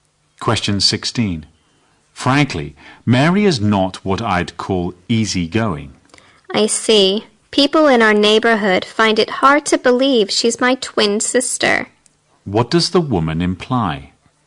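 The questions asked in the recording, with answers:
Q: What does the woman imply?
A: She and her twin sister Mary have very different personalities.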